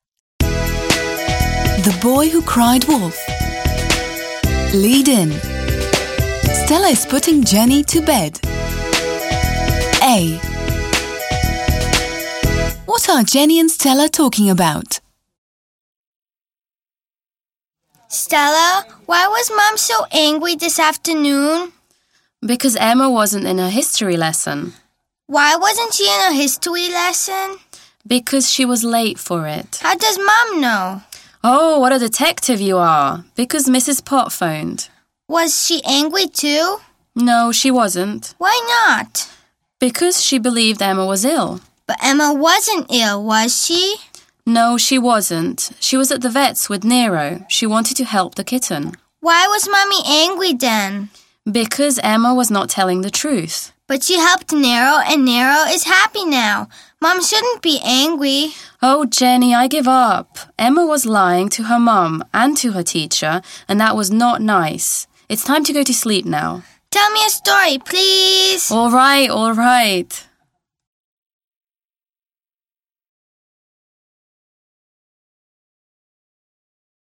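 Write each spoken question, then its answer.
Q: What are Jenny and Stella talking about?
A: Why Mom was angry: Emma missed her history lesson and lied because she took Nero to the vet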